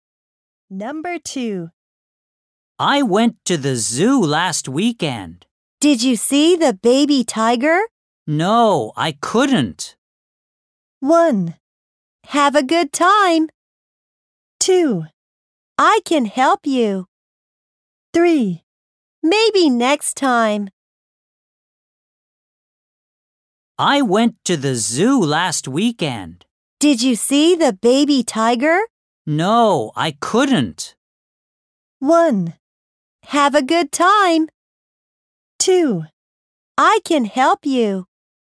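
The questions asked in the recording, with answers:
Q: No, I couldn't.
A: 3: Maybe next time.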